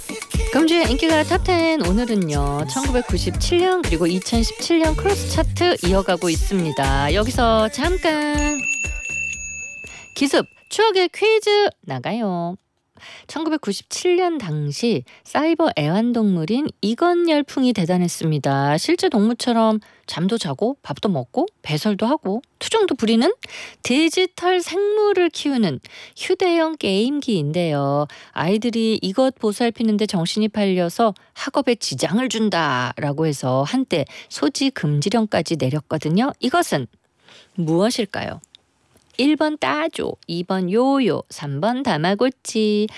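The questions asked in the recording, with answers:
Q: 이것은 무엇일까요?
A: 3번: 다마고치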